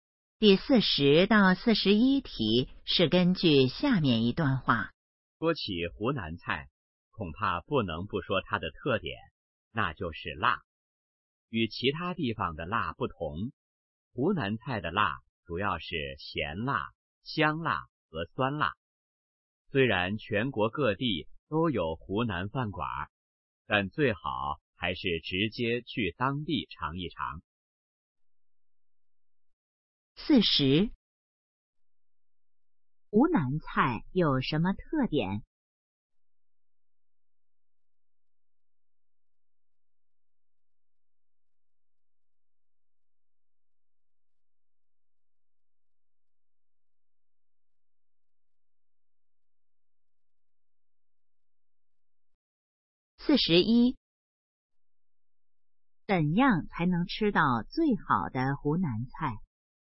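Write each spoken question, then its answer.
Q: 怎样才能吃到最好的湖南菜?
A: 直接去湖南当地尝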